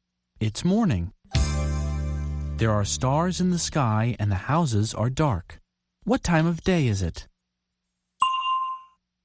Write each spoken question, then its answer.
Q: What time of day is it?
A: It's night.